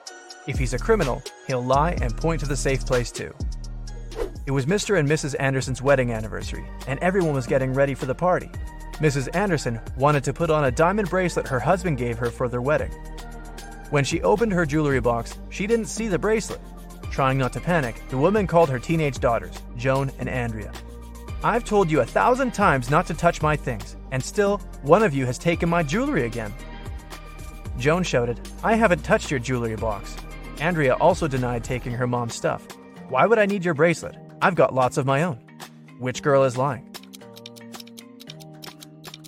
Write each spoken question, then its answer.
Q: Which girl is lying?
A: It was Andrea who took the earrings.